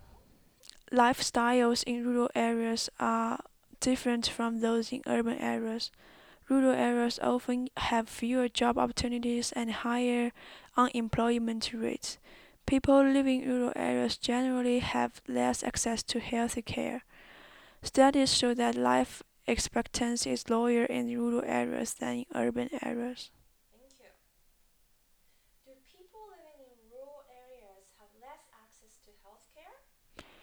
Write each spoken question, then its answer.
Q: Do people living in rural areas have less access to health care?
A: Yes, they do.